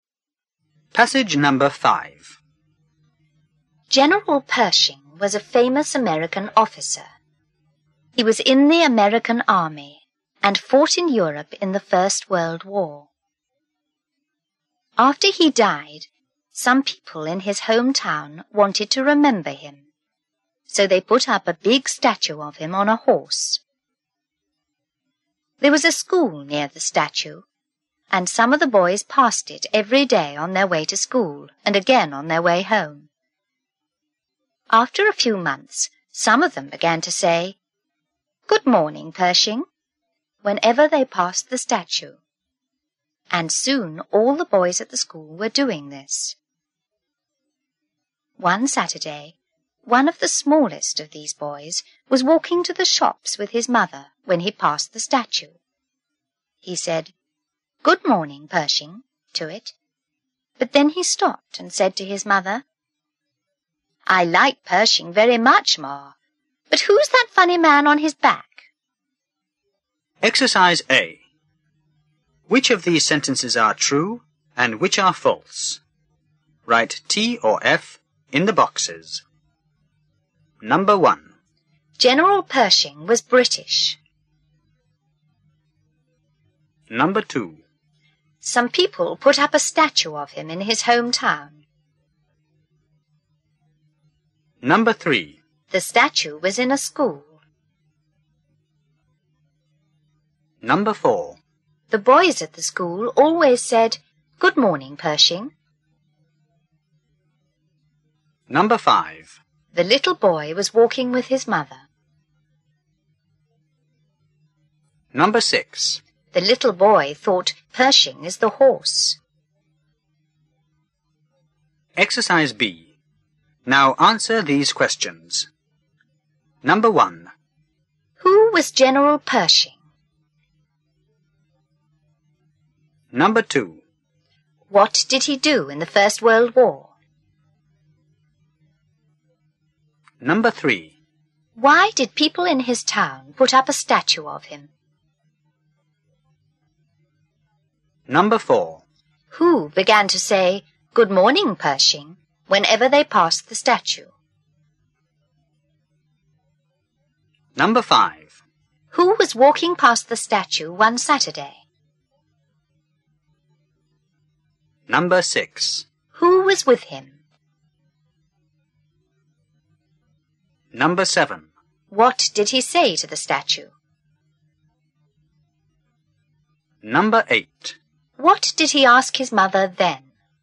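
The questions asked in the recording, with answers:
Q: General Pershing was British.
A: False

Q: Some people put up a statue of him in his hometown.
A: True

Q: The statue was in a school.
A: False

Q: The little boy was walking with his mother.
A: True

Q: The little boy thought Pershing is the horse.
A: True

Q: Who was General Pershing?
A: A famous American officer

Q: What did he do in the First World War?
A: He fought in Europe in the American Army

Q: Why did people in his town put up a statue of him?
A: They wanted to remember him

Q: Who began to say, "Good morning, Pershing," whenever they passed the statue?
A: Some boys from the school near the statue

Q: Who was walking past the statue one Saturday?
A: One of the smallest boys

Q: Who was with him?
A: His mother

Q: What did he say to the statue?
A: Good morning, Pershing

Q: What did he ask his mother then?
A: Who's that funny man on Pershing's back?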